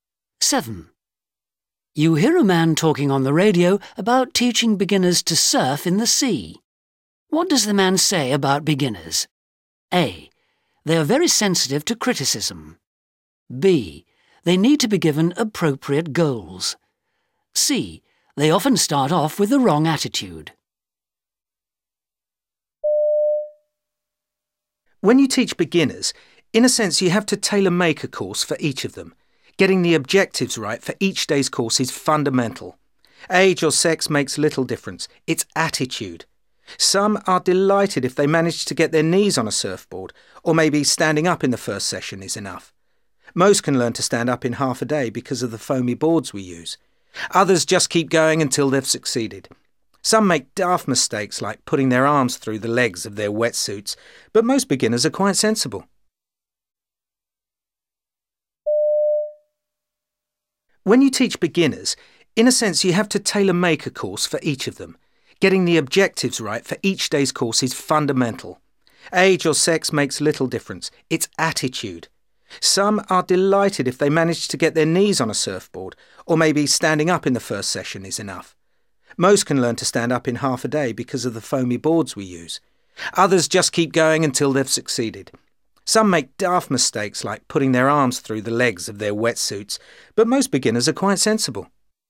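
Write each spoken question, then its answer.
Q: What does the man say about beginners?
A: B: They need to be given appropriate goals.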